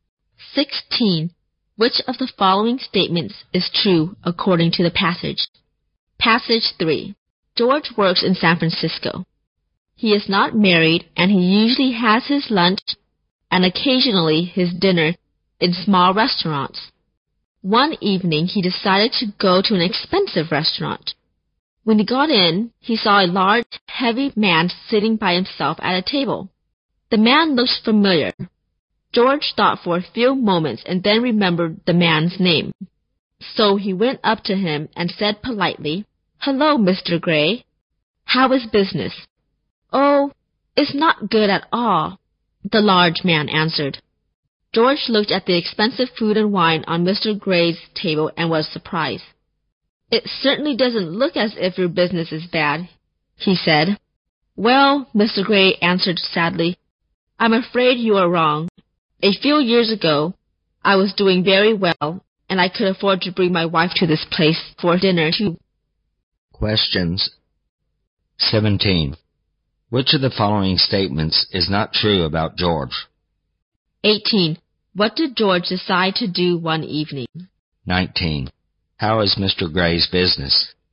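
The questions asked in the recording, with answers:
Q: What did George decide to do one evening?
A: Go to an expensive restaurant.

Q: How is Mr. Gray's business?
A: Not good at all.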